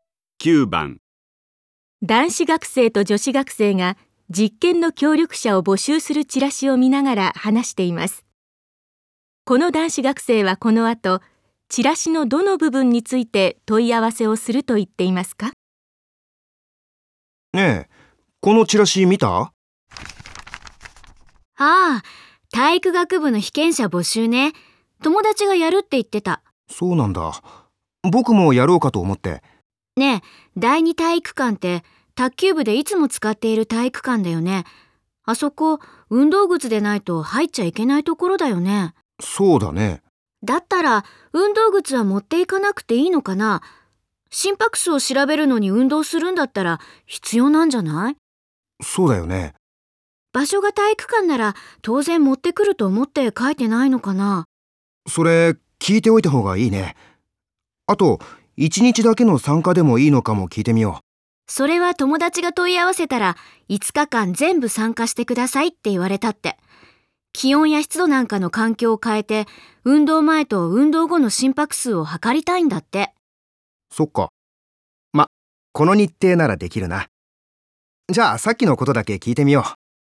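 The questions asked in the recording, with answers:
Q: この男子学生はこの後チラシのどの部分について問い合わせをすると言っていますか?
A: 持ち物(運動靴を持っていく必要があるか)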